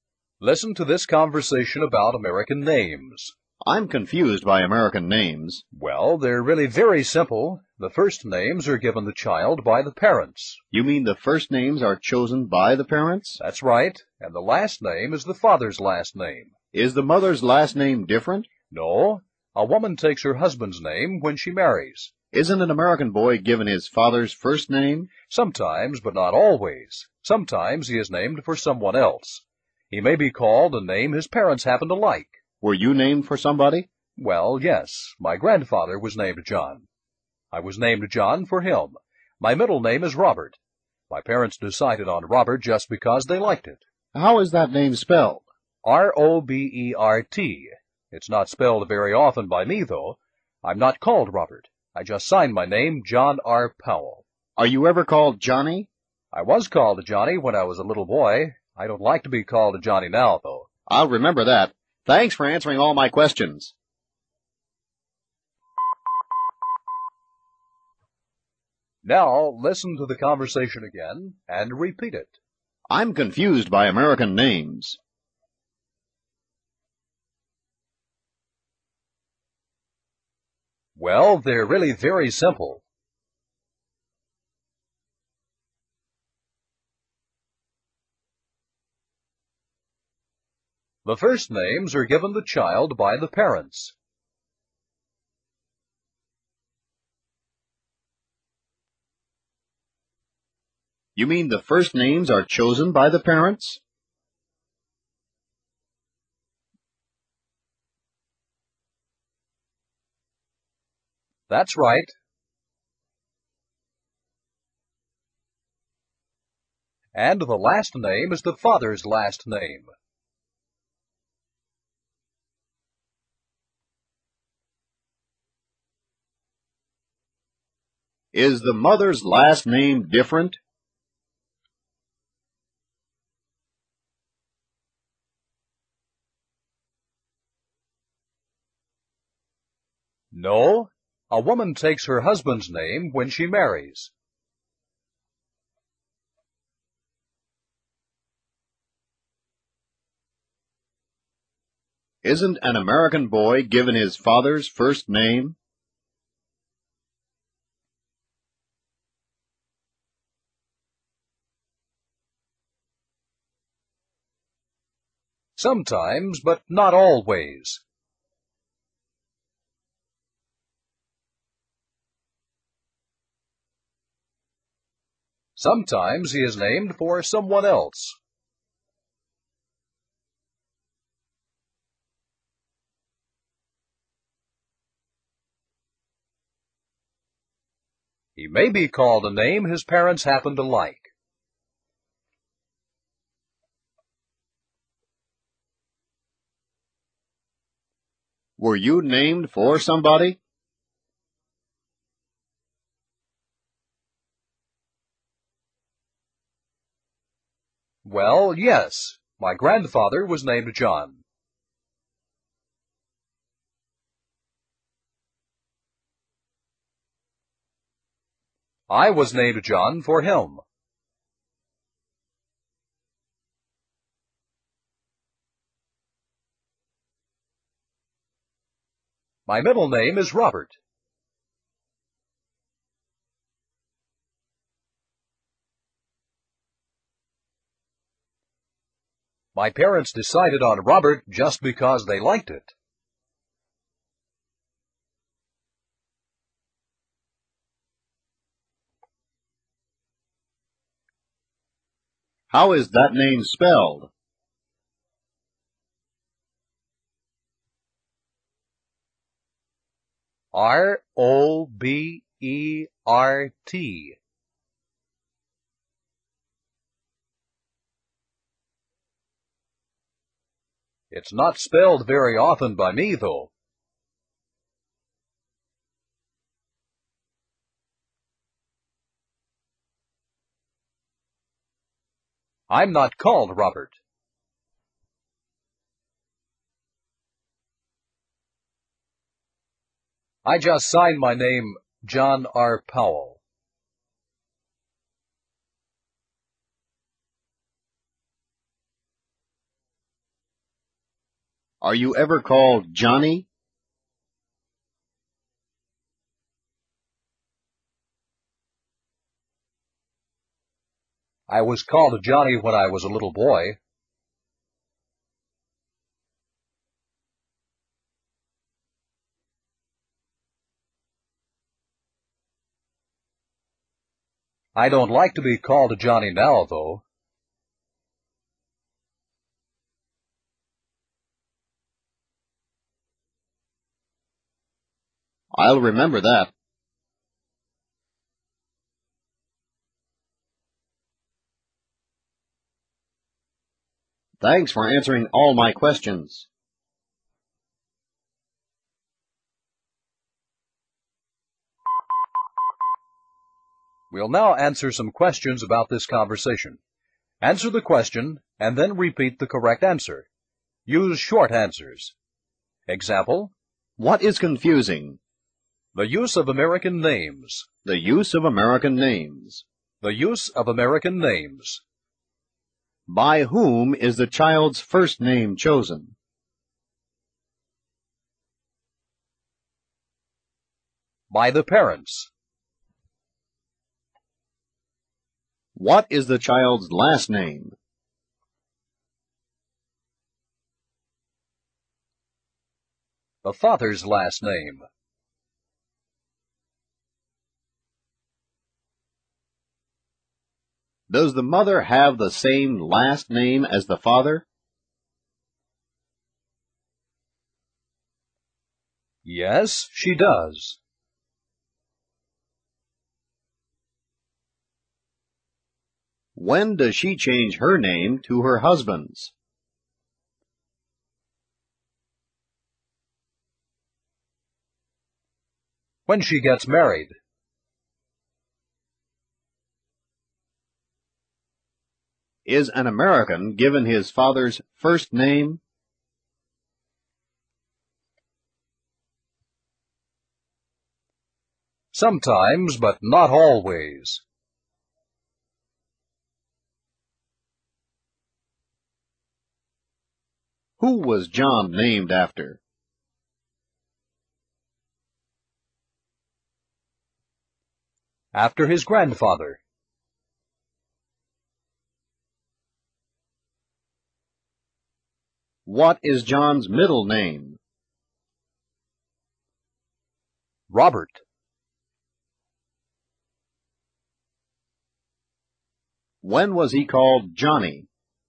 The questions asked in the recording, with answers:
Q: By whom is the child's first name chosen?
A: By the parents.

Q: What is the child's last name?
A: The father's last name.

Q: Does the mother have the same last name as the father?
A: Yes, she does.

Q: When does she change her name to her husband's?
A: When she gets married.

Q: Is an American given his father's first name?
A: Sometimes, but not always.

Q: Who was John named after?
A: After his grandfather.

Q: What is John's middle name?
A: Robert.

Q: When was he called Johnny?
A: When he was a little boy.